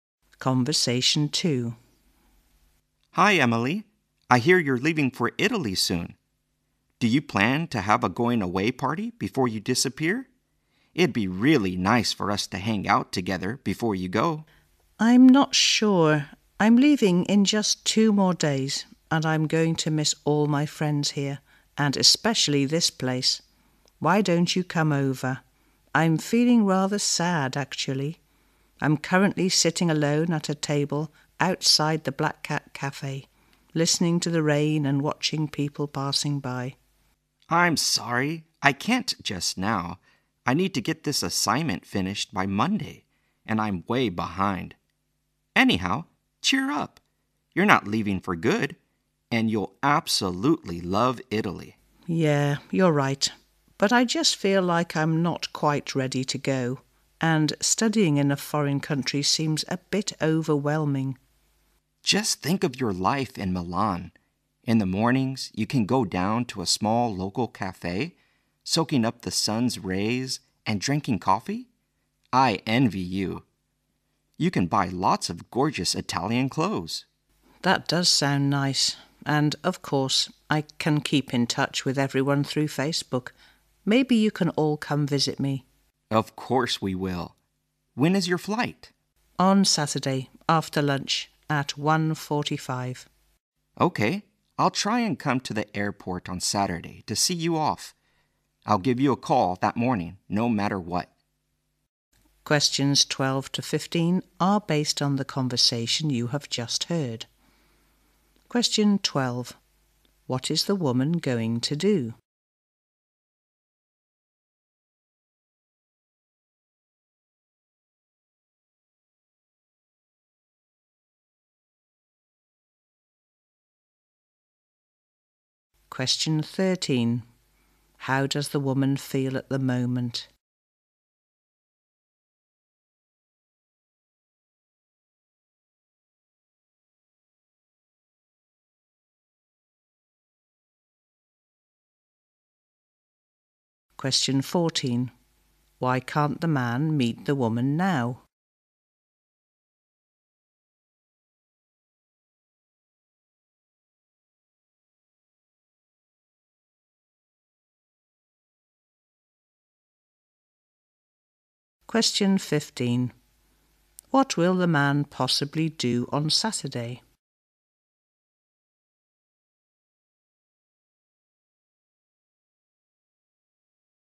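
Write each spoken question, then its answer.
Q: What is the woman going to do?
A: Go to study in Italy

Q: How does the woman feel at the moment?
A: Rather sad

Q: Why can't the man meet the woman now?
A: He must finish an assignment by Monday

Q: What will the man possibly do on Saturday?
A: See her off at the airport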